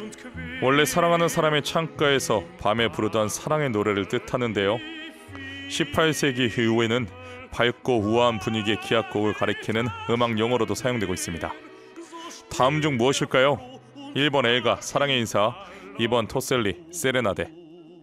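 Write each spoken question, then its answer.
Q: 다음 중 무엇일까요? 1번 엘가 사랑의 인사, 2번 토셀리 세레나데.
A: 2: 토셀리 세레나데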